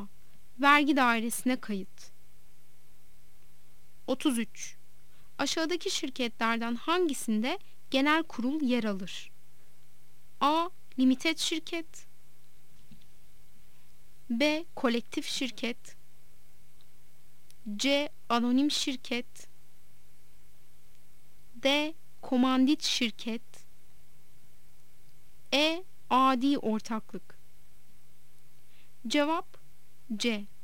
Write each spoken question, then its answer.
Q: Aşağıdaki şirketlerden hangisinde genel kurul yer alır?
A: Cevap C.